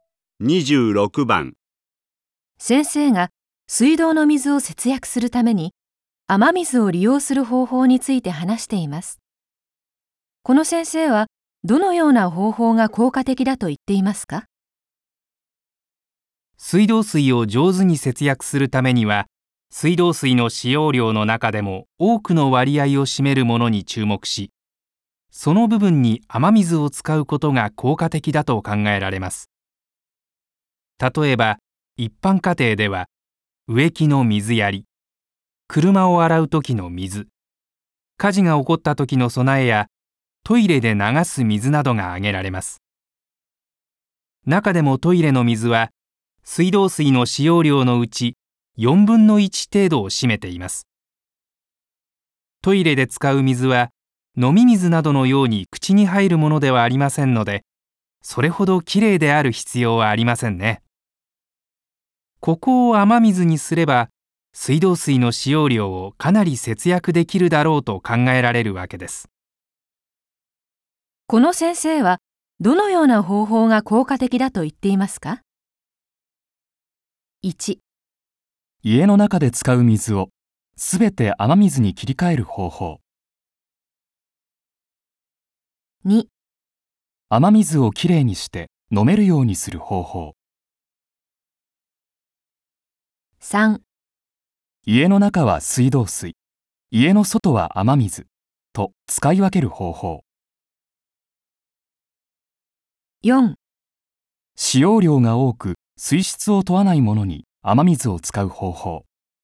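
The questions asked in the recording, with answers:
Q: この先生はどのような方法が効果的だと言っていますか?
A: 4: 使用量が多く水質を問わないものに雨水を使う方法。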